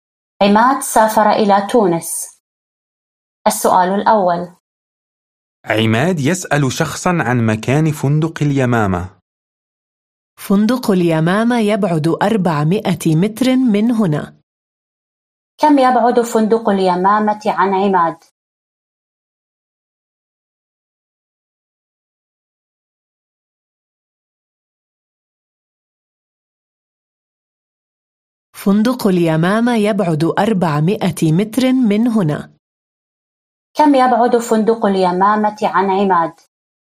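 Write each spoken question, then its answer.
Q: كم يبعد فندق اليمامة عن عماد؟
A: 400 متر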